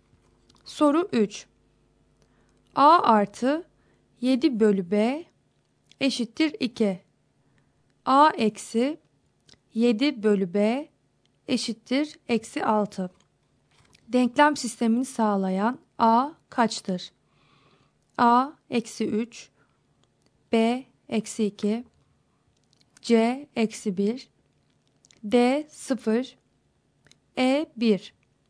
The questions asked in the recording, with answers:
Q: Denklem sistemini sağlayan A kaçtır?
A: Doğru cevap B şıkkı.